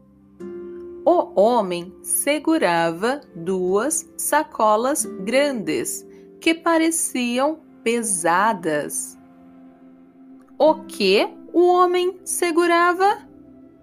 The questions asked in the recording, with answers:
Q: O que o homem segurava?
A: duas sacolas grandes que pareciam pesadas.